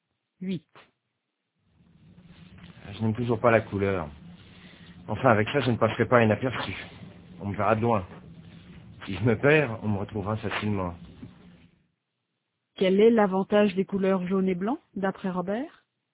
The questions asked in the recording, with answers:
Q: Quel est l'avantage des couleurs jaune et blanc, d'après Robert?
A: On le verra de loin. S'il se perd, on le retrouvera facilement.